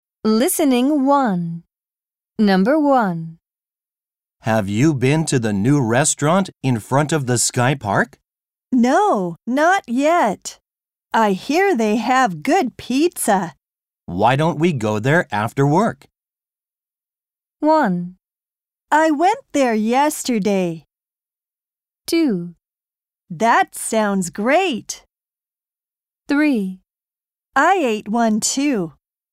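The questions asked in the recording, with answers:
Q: Why don't we go there after work?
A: 2: That sounds great.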